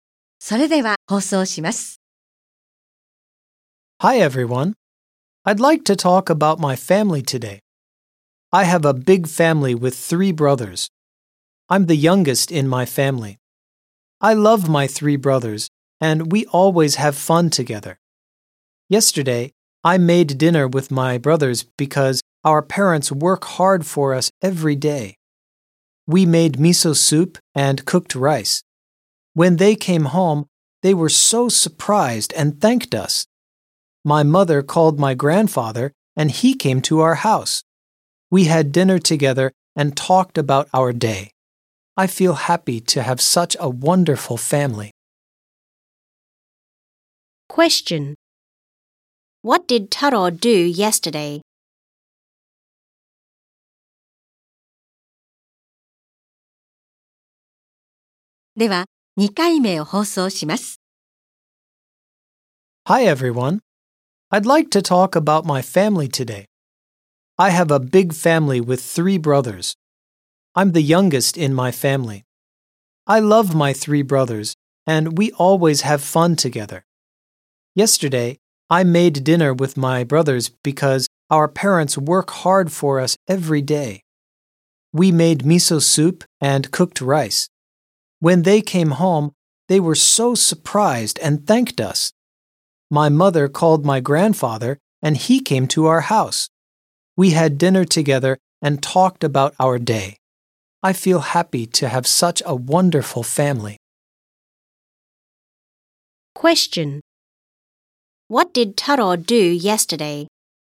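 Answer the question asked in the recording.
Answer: He made dinner (miso soup and rice) with his brothers.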